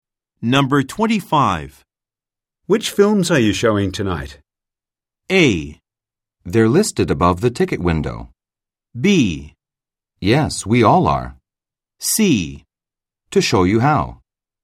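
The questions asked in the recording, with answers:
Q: Which films are you showing tonight?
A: A: They're listed above the ticket window.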